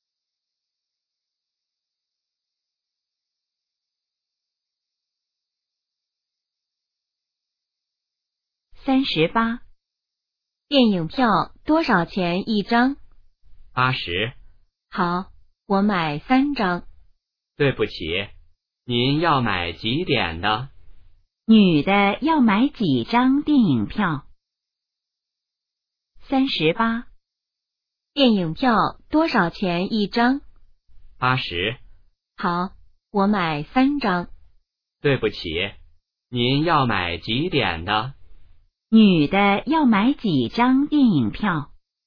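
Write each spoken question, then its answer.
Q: 女的要买几张电影票?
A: 三张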